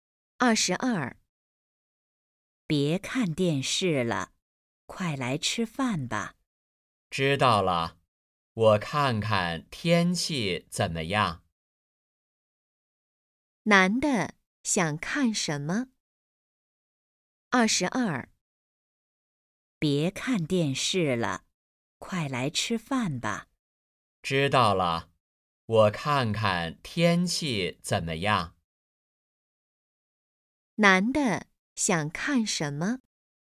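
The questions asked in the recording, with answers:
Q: 男的想看什么?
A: 天气(预报)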